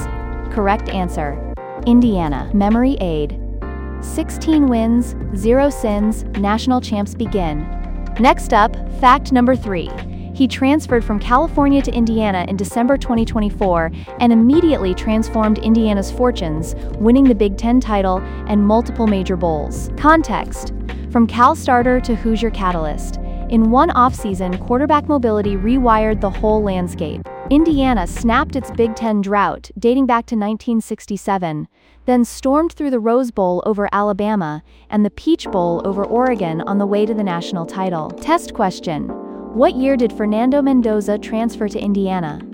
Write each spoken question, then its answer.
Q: what year did Fernando Mendoza transfer to Indiana?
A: 2024.